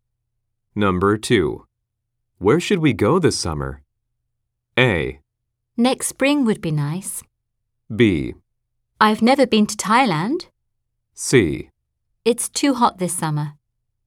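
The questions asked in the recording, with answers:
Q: Where should we go this summer?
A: B: I've never been to Thailand.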